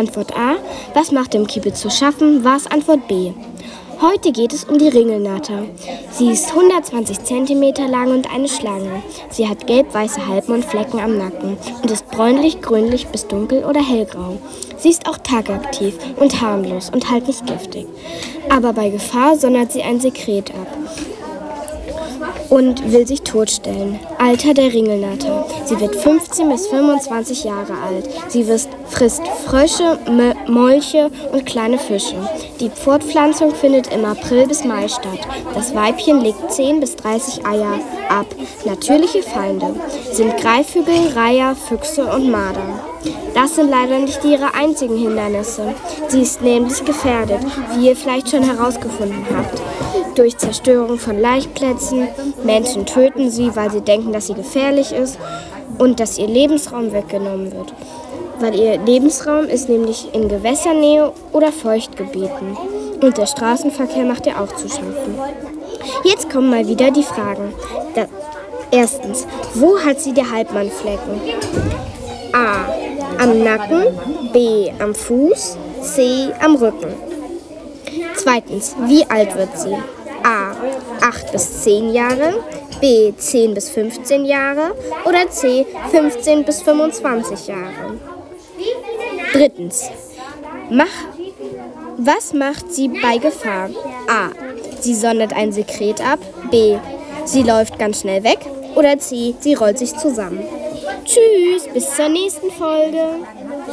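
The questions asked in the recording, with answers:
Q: Erstens, wo hat sie die Halbmannflecken?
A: A: Am Nacken

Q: Zweitens, wie alt wird sie?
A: C: 15 bis 25 Jahre

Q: Drittens, was macht sie bei Gefahr?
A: A: Sie sondert ein Sekret ab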